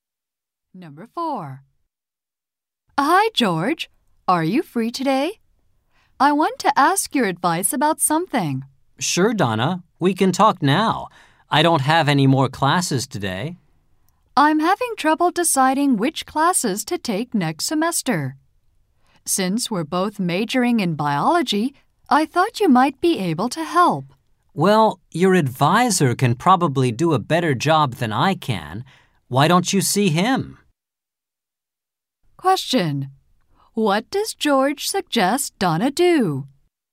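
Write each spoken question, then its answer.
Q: What does George suggest Donna do?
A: See her advisor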